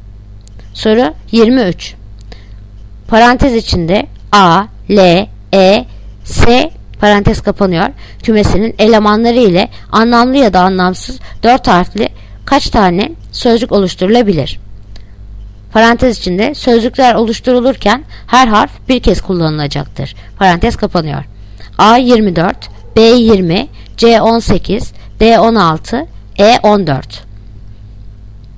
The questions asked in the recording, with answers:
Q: Parantez içinde A, L, E, S parantez kapanıyor kümesinin elemanları ile anlamlı ya da anlamsız 4 harfli kaç tane sözcük oluşturulabilir?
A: Yanıt Adana 24.